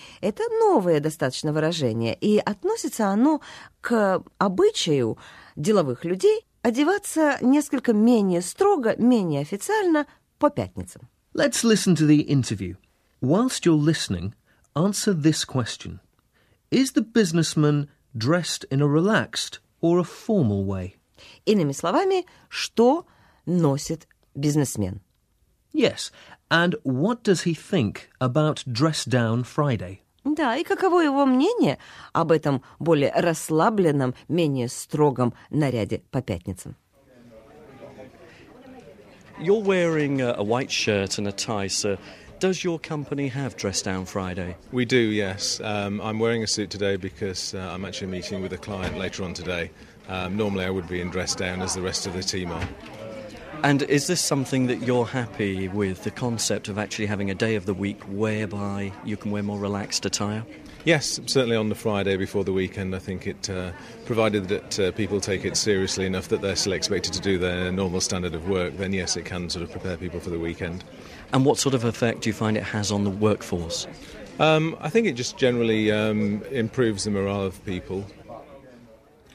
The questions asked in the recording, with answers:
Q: Is the businessman dressed in a relaxed or a formal way?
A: A suit with a shirt and tie is quite a formal way of dressing, isn't it, Rita?

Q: Yes, and what does he think about Dress Down Friday?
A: Вообще-то он относится к этой идее положительно.